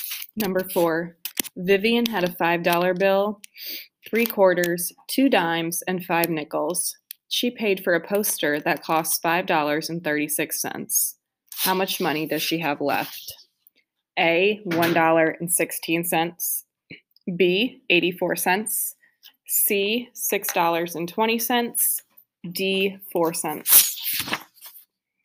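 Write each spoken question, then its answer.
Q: How much money does she have left?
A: B: 84 cents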